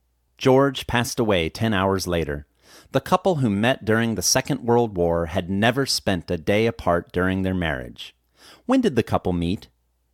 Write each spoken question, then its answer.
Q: When did the couple meet?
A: The couple met during the Second World War.